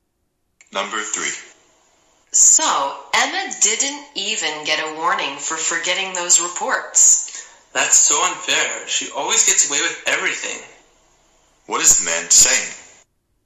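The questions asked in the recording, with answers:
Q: What is the man saying?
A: It's unfair that Emma always gets away with things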